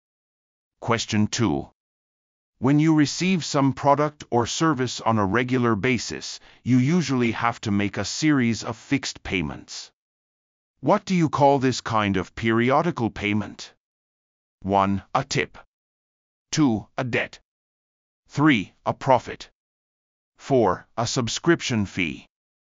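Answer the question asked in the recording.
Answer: 4: A subscription fee.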